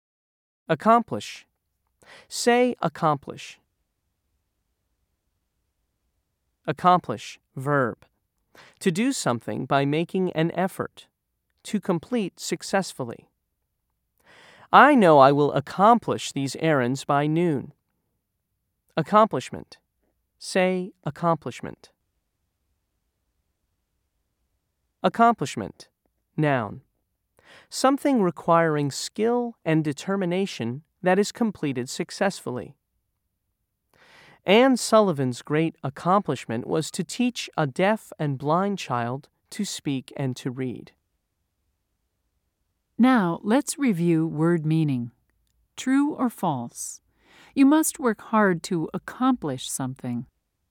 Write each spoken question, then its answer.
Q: True or false? You must work hard to accomplish something.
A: If you said true, you were correct.